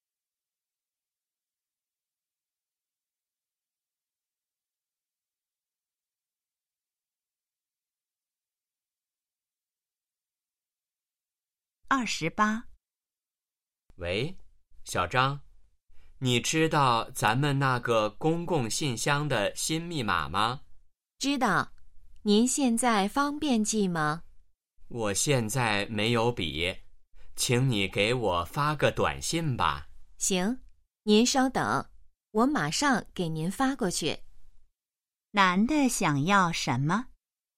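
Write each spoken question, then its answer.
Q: 男的想要什么?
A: 公共信箱的新密码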